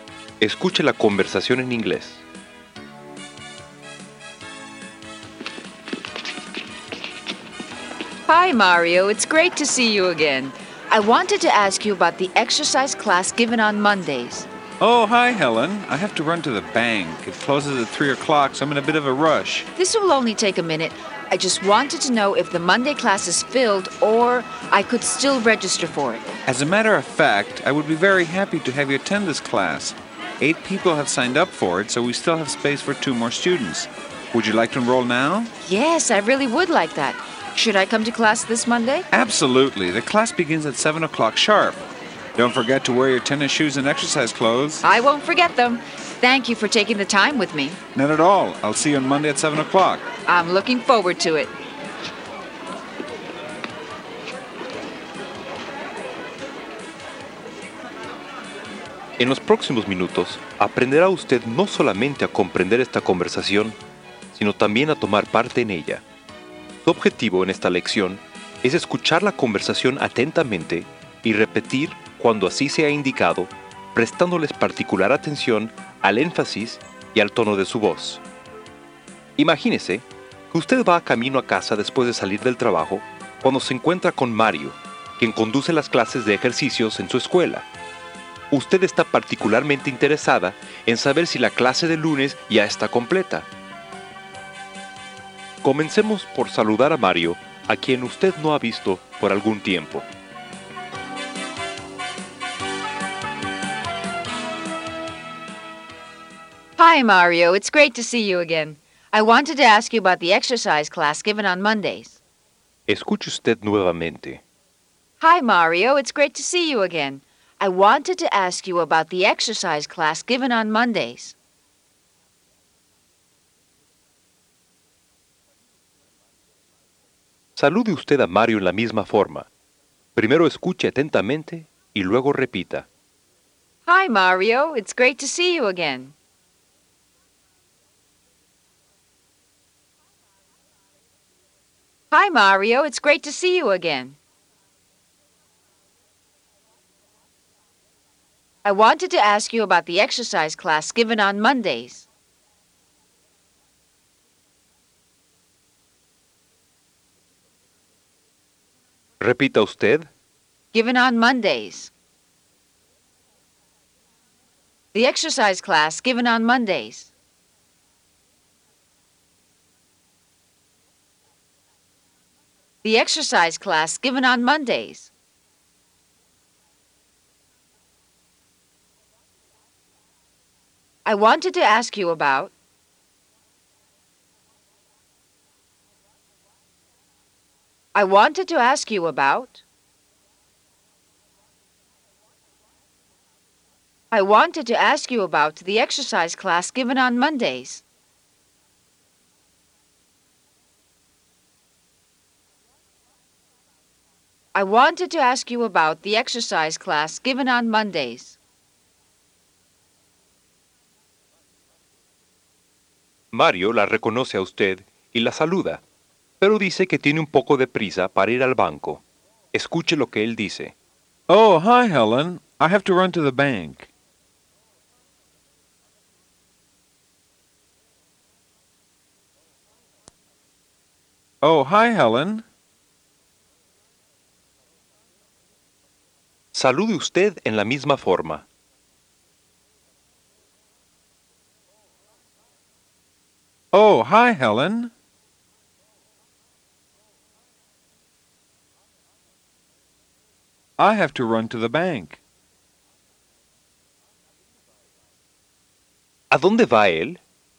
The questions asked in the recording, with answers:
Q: ¿A dónde va él?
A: To the bank.